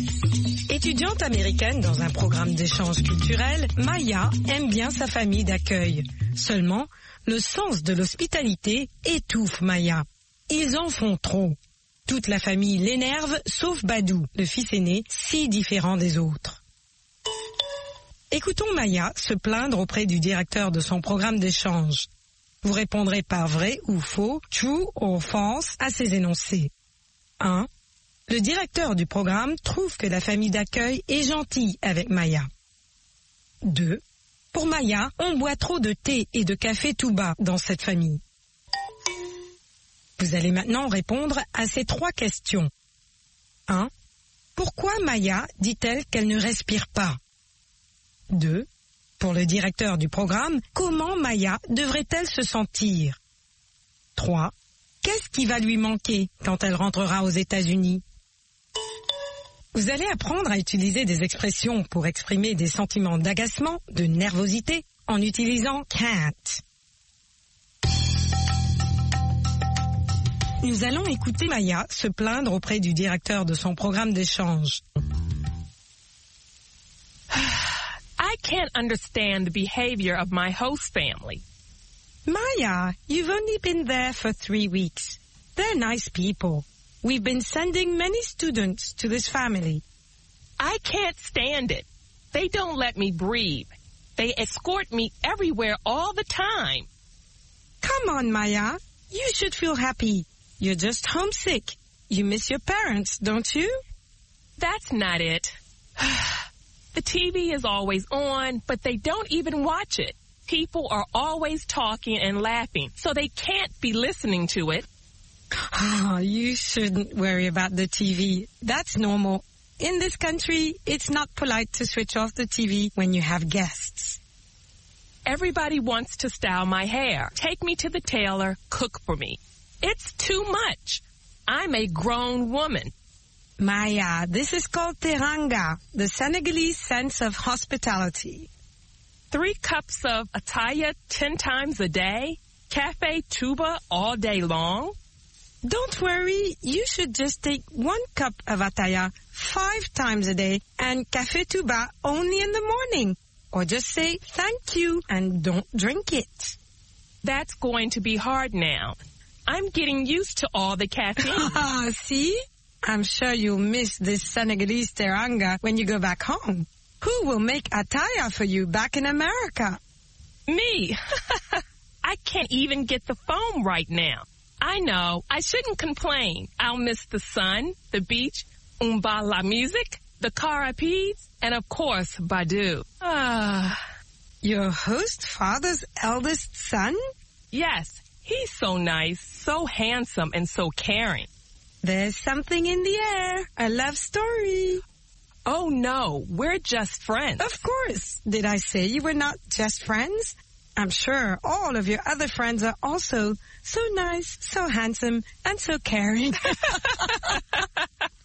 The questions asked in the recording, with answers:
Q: Le directeur du programme trouve que la famille d'accueil est gentille avec Maya.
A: L'énoncé 1 est vrai.

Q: Pour Maya, on boit trop de thé et de café tout bas dans cette famille.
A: L'énoncé 2 est vrai.

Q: Pourquoi Maya dit-elle qu'elle ne respire pas?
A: Parce qu'on l'escorte toujours, partout.

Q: Pour le directeur du programme, comment Maya devrait-elle se sentir?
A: Heureuse.